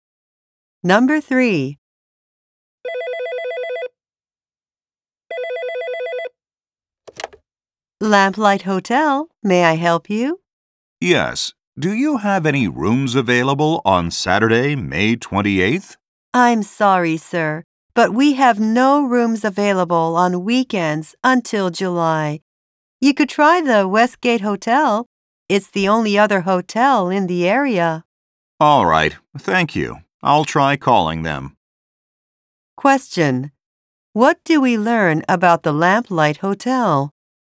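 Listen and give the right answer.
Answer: It has no rooms available on weekends until July.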